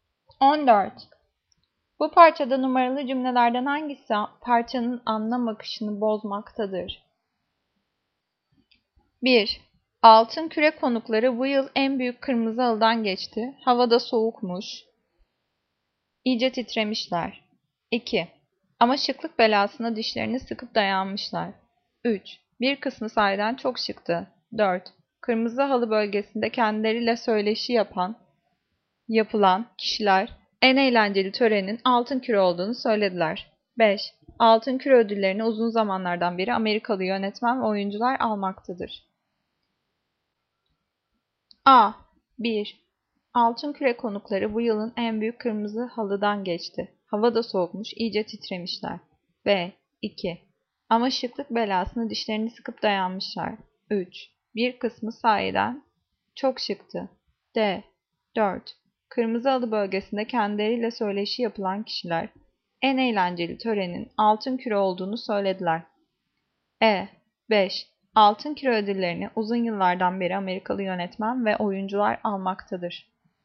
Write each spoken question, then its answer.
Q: Bu parçada numaralı cümlelerden hangisi parçanın anlam akışını bozmaktadır?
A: Cevap E. 5. Altın küre ödüllerini uzun yıllardan beri Amerikalı yönetmen ve oyuncular almaktadır.